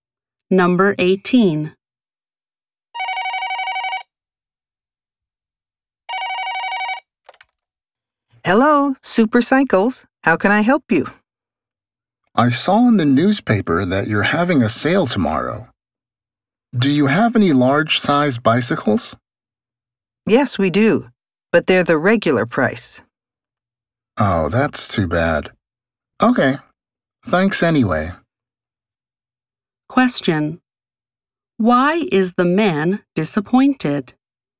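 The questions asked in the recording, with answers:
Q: Why is the man disappointed?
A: The large size bicycles are not on sale; they're regular price.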